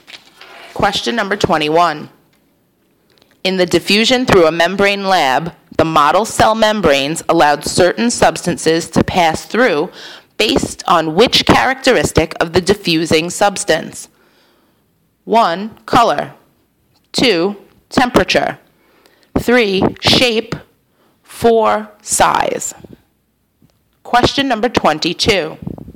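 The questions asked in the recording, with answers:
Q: In the diffusion through a membrane lab, the model cell membranes allowed certain substances to pass through based on which characteristic of the diffusing substance?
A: 4: Size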